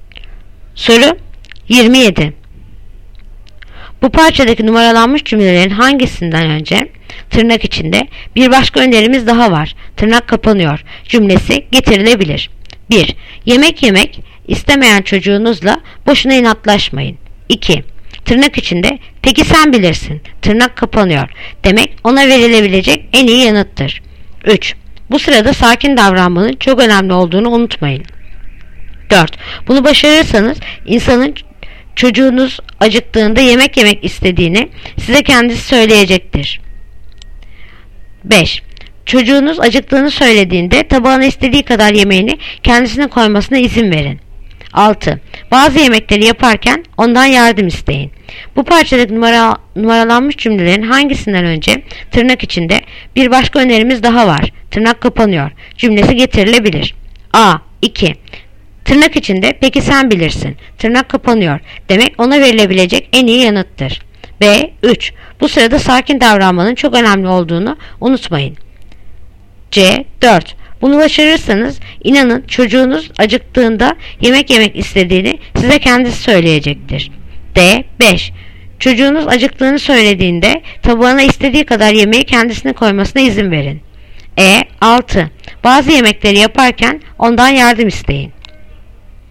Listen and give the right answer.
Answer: Yanıt Edirne. 6. Bazı yemekleri yaparken ondan yardım isteyin.